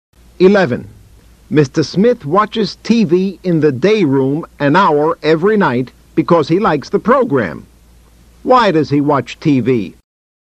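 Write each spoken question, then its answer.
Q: Why does he watch TV?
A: Because he likes the program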